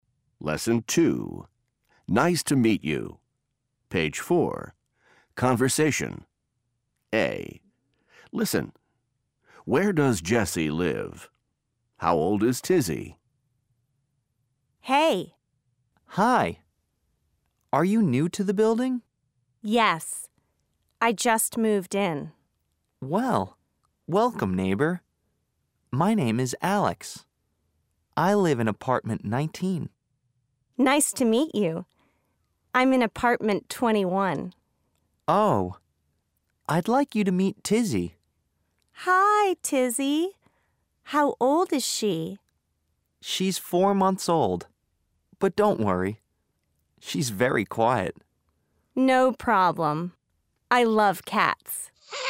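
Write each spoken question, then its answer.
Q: How old is Tizzy?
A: 4 months old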